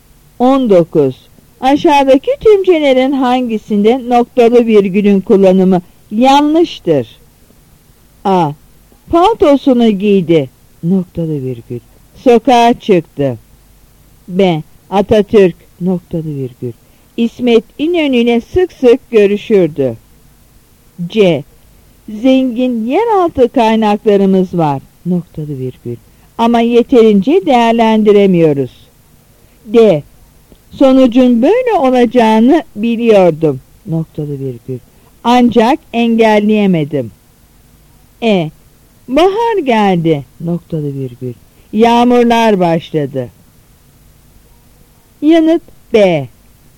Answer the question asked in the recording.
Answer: Yanıt B.